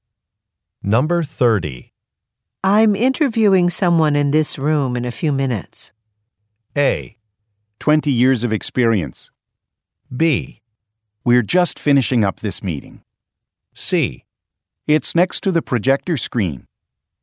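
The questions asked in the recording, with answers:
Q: I'm interviewing someone in this room in a few minutes.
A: B: We're just finishing up this meeting.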